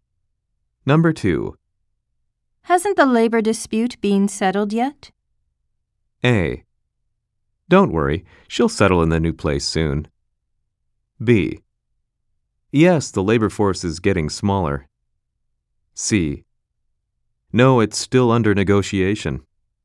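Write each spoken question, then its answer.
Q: Hasn't the labor dispute been settled yet?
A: C: No, it's still under negotiation.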